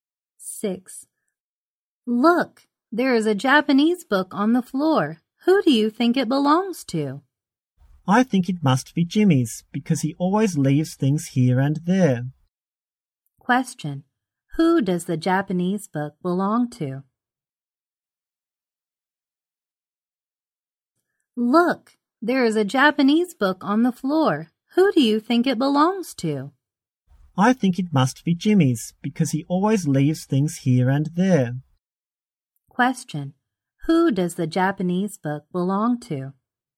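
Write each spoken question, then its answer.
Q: Who does the Japanese book belong to?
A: Jimmy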